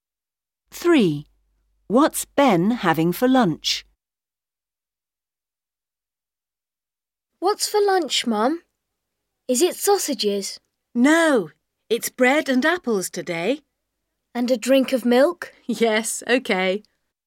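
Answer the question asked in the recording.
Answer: Bread and apples, with milk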